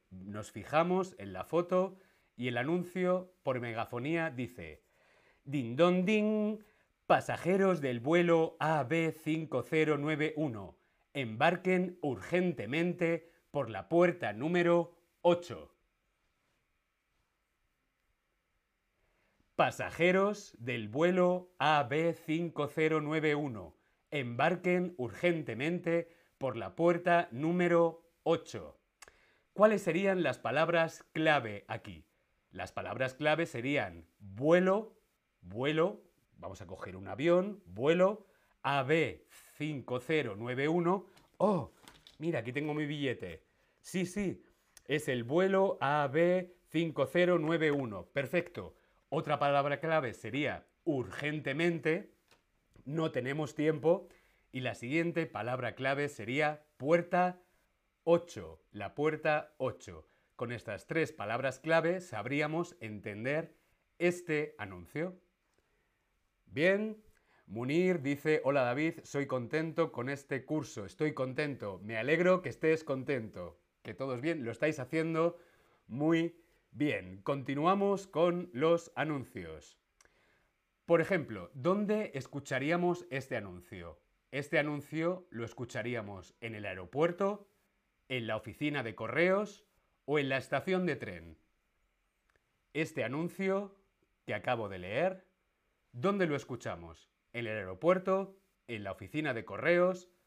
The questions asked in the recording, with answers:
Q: Este anuncio que acabo de leer ¿Dónde lo escuchamos?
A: este anuncio que acabo de leer lo escuchamos en el aeropuerto